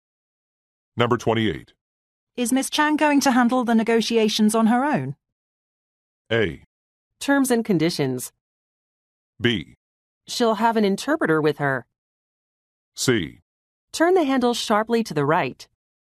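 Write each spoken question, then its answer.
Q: Is Miss Chang going to handle the negotiations on her own?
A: B: She'll have an interpreter with her.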